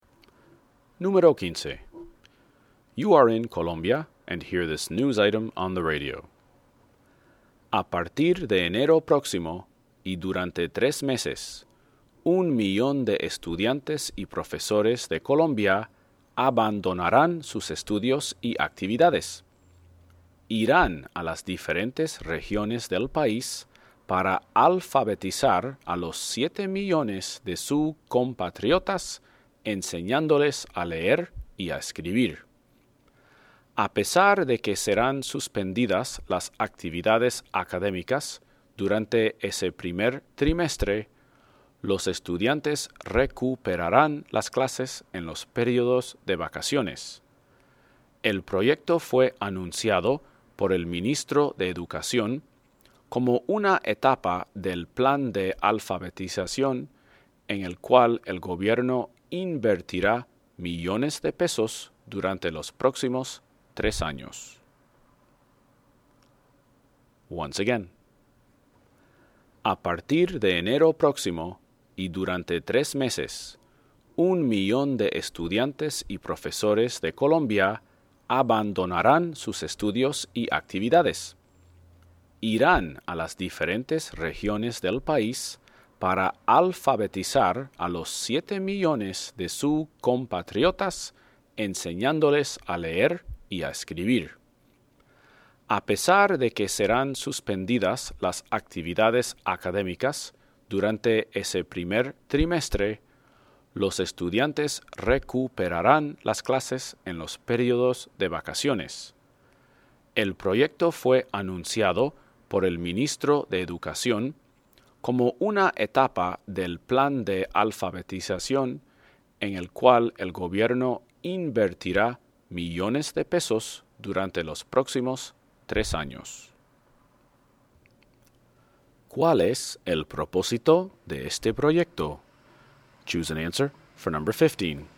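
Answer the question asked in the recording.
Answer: Alfabetizar a 7 millones de colombianos, enseñándoles a leer y a escribir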